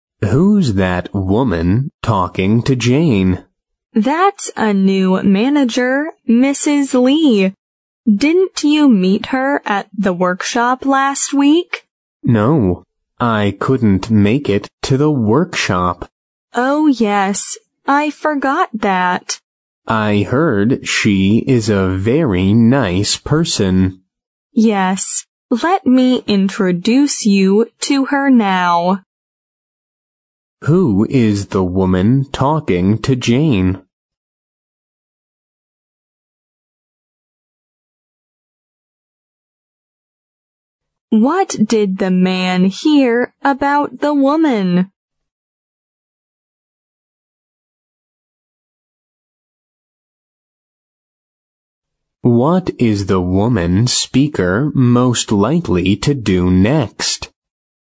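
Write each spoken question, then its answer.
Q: Who is the woman talking to Jane?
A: A new manager, Mrs. Lee

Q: What did the man hear about the woman?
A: She is a very nice person

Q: What is the woman speaker most likely to do next?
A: Introduce the man to Mrs. Lee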